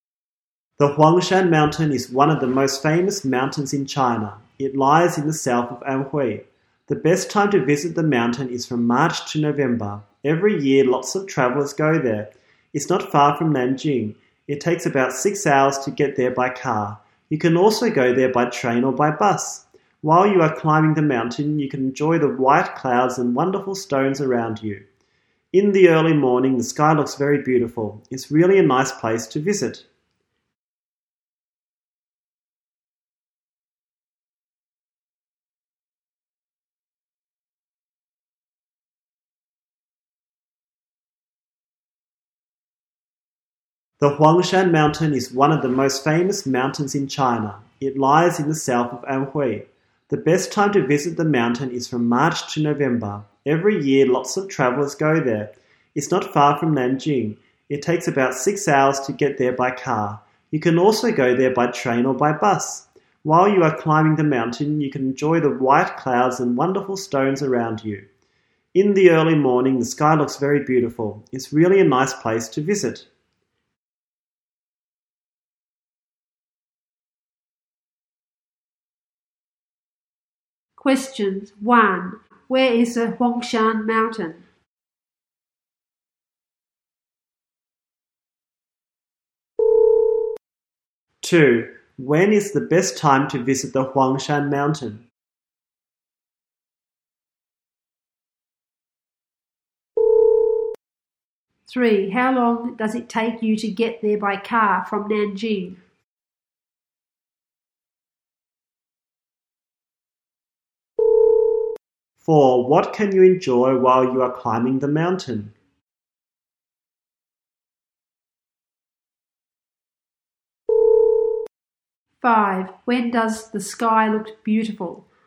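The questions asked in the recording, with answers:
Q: Where is the Huangshan Mountain?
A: In the south of Anhui

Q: When is the best time to visit the Huangshan Mountain?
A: From March to November

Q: How long does it take you to get there by car from Nanjing?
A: About 6 hours

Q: What can you enjoy while you are climbing the mountain?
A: The white clouds and wonderful stones

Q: When does the sky look beautiful?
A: In the early morning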